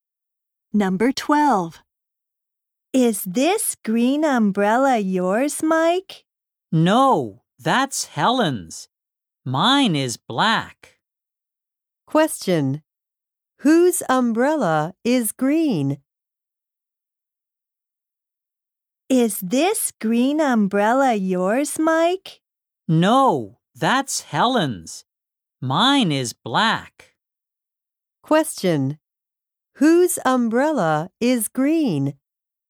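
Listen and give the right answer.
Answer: Helen's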